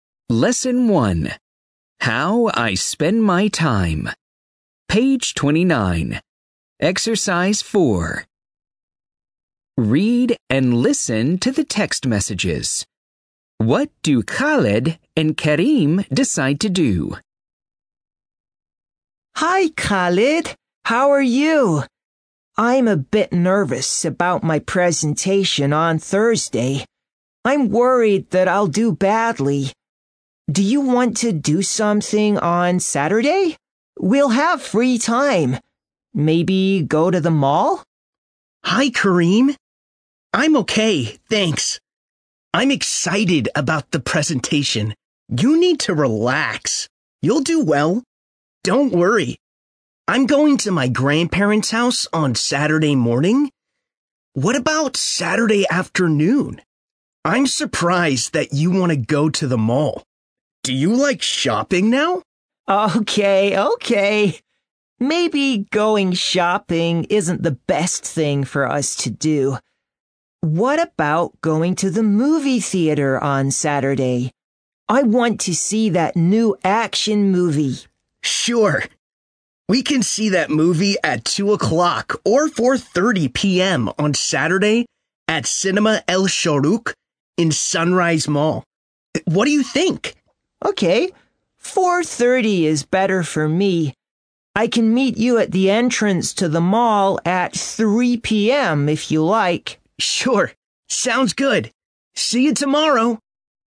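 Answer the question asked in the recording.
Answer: Go to the movie theater on Saturday at 4:30 p.m. to see a new action movie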